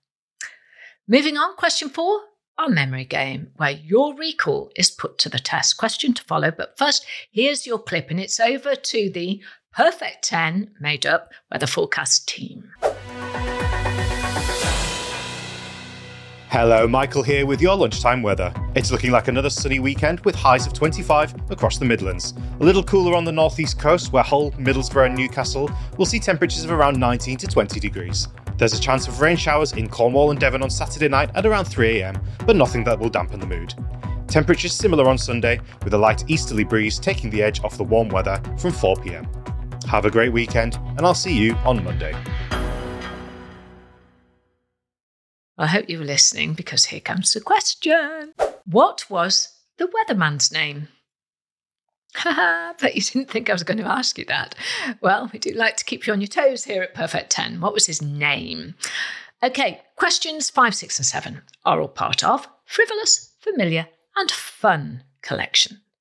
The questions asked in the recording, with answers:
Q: What was the weatherman's name?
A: The answer was, his name was Michael.